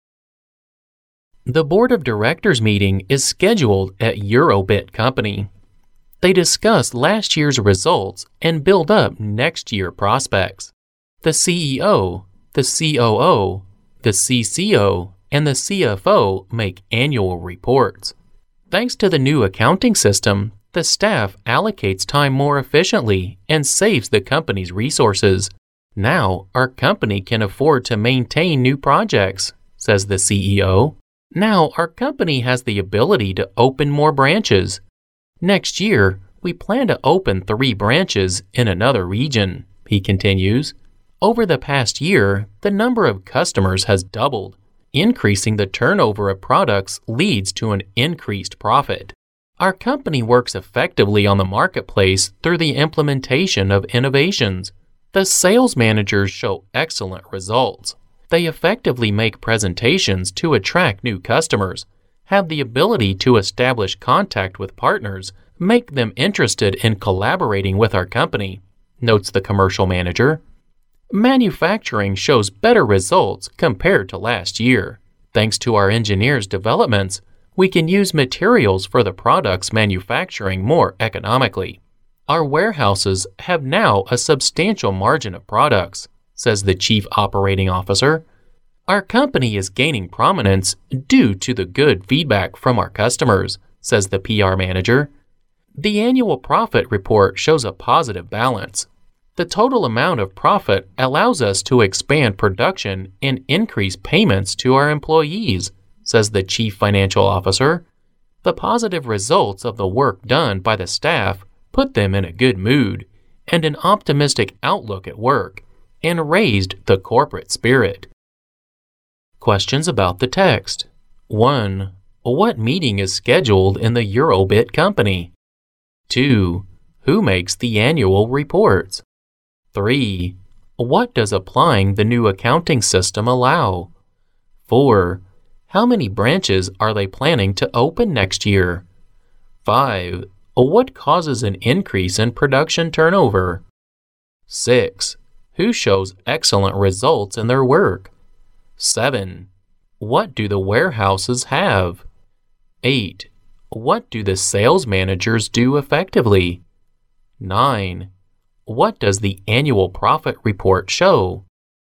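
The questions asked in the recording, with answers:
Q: What meeting is scheduled in the Eurobit company?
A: The board of directors meeting

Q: Who makes the annual reports?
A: The CEO, the COO, the CCO, and the CFO

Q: What does applying the new accounting system allow?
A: The staff allocates time more efficiently and saves the company's resources

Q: Who shows excellent results in their work?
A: The sales managers

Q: What do the warehouses have?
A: A substantial margin of products

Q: What do the sales managers do effectively?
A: Make presentations to attract new customers

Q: What does the annual profit report show?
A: A positive balance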